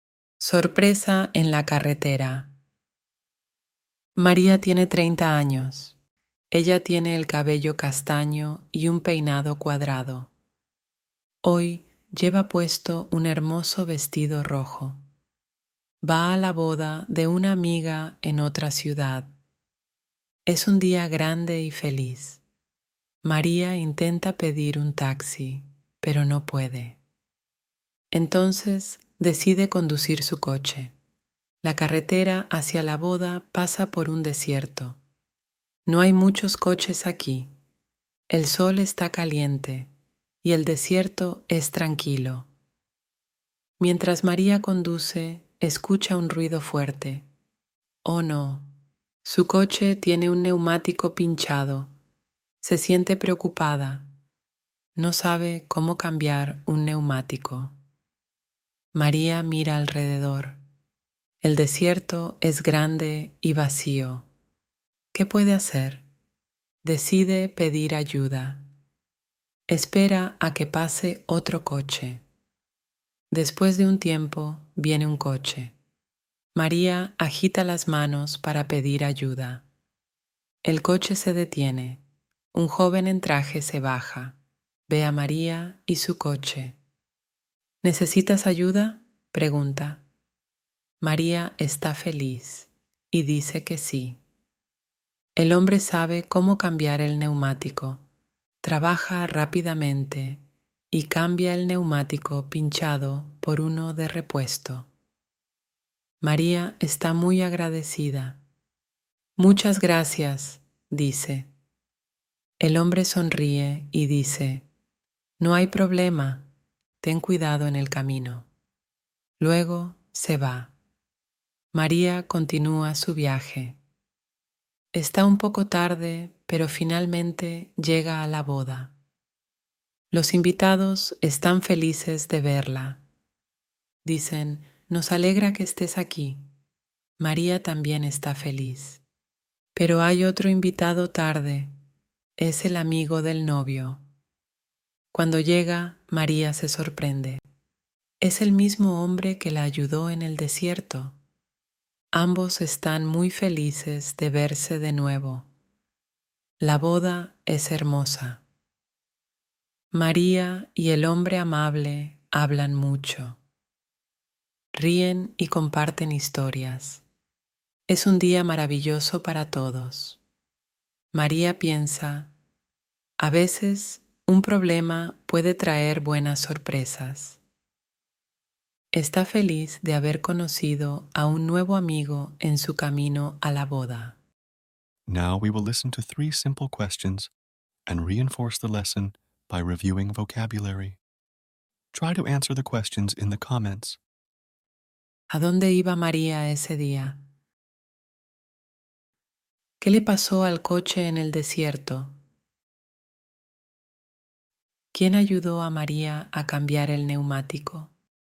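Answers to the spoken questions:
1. A la boda de una amiga en otra ciudad
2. Tenía un neumático pinchado
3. Un joven en traje, el amigo del novio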